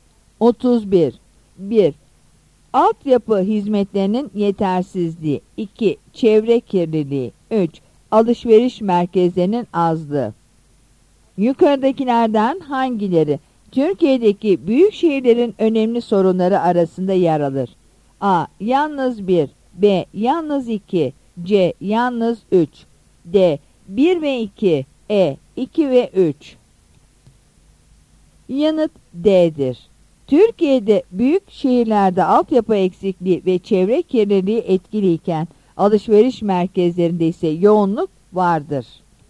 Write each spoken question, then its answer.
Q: Yukarıdakilerden hangileri Türkiye'deki büyük şehirlerin önemli sorunları arasında yer alır?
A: Yanıt D'dir.